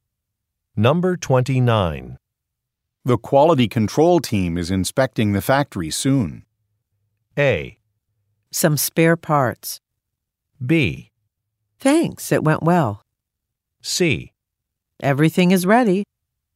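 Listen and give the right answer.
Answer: C: Everything is ready.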